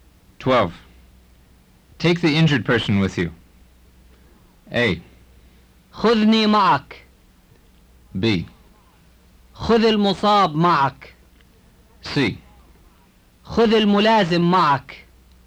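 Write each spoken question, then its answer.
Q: Take the injured person with you.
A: B: خذ المصاب معك.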